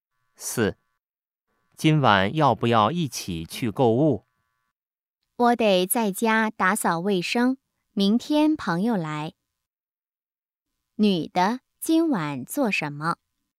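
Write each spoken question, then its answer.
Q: 女的,今晚做什么?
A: 在家打扫卫生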